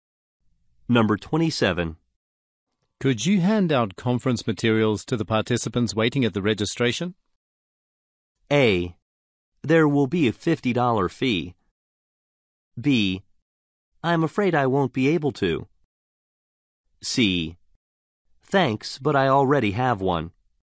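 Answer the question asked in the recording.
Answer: B: I'm afraid I won't be able to.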